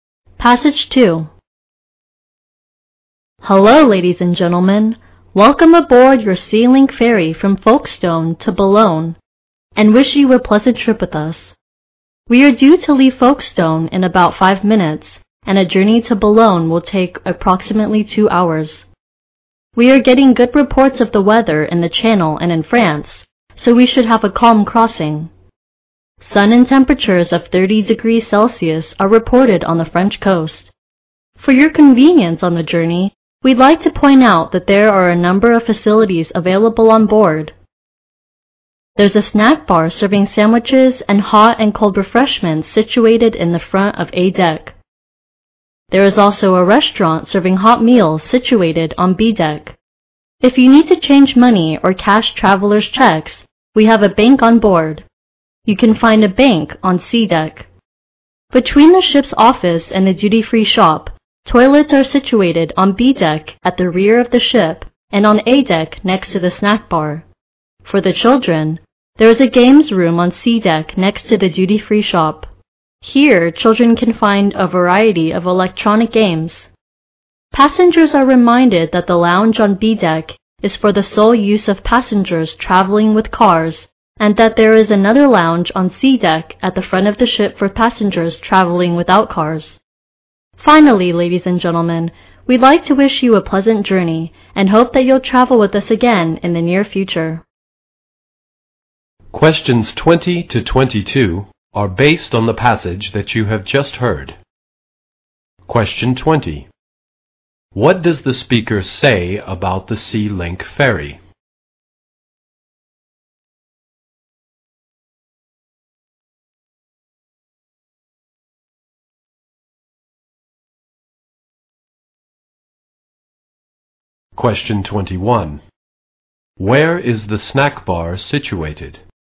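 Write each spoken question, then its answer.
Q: Where is the snack bar situated?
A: At the front of A deck.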